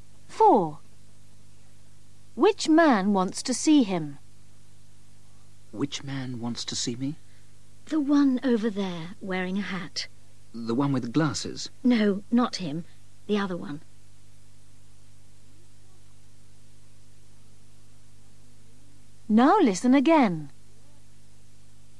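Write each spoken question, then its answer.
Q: Which man wants to see him?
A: the man wearing a hat, not the one with glasses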